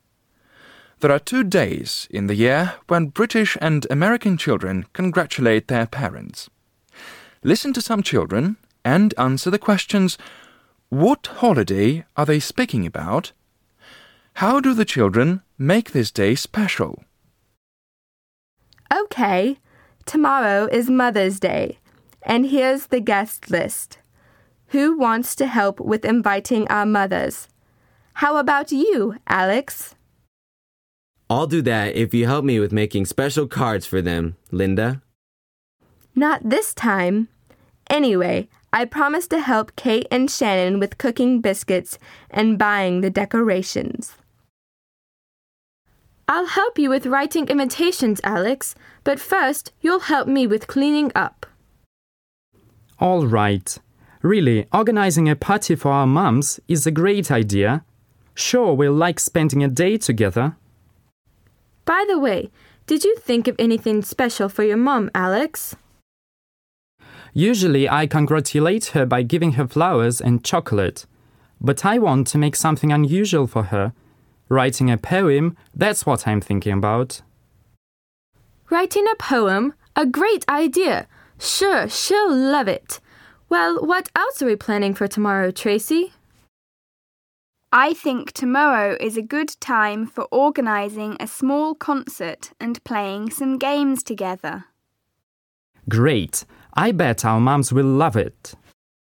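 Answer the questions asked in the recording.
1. Mother's Day
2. They invite their mothers to a party with special cards, biscuits, decorations, a poem, a small concert and games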